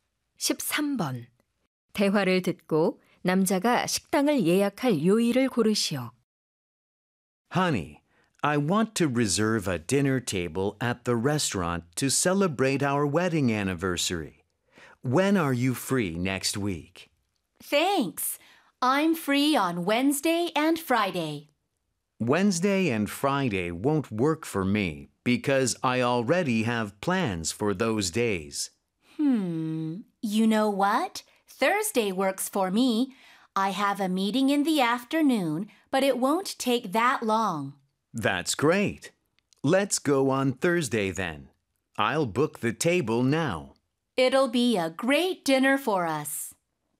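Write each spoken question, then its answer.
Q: 대화를 듣고 남자가 식당을 예약할 요일을 고르시오.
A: 목요일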